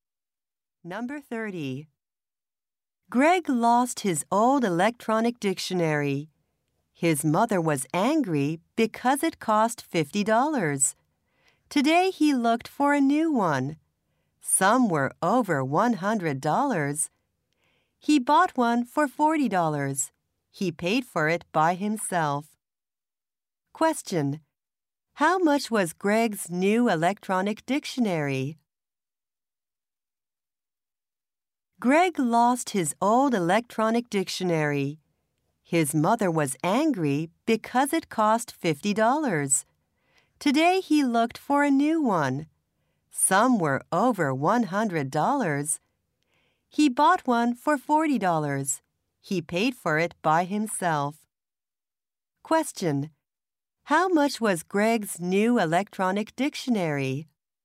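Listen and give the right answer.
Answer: $40.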